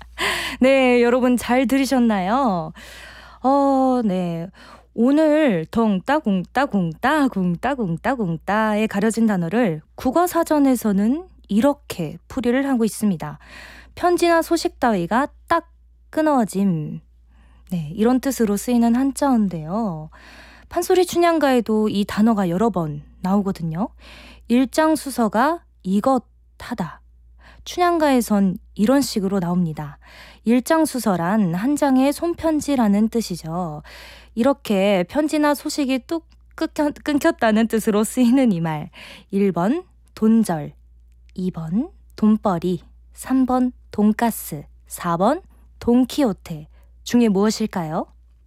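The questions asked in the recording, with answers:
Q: 1번 돈절, 2번 돈벌이, 3번 돈가스, 4번 돈키호테 중에 무엇일까요?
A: 1번: 돈절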